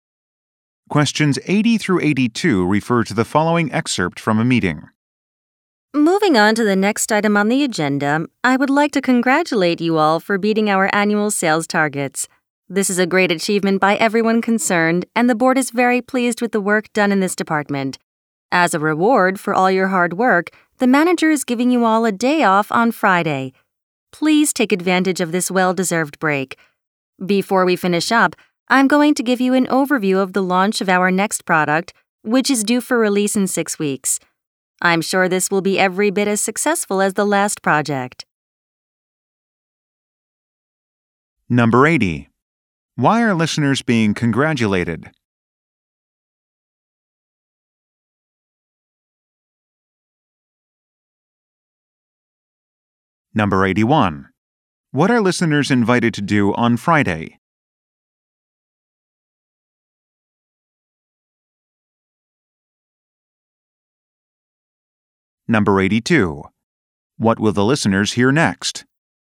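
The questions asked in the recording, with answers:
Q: Why are listeners being congratulated?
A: They beat annual sales targets

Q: What are listeners invited to do on Friday?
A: Take a day off

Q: What will the listeners hear next?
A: An overview of the next product launch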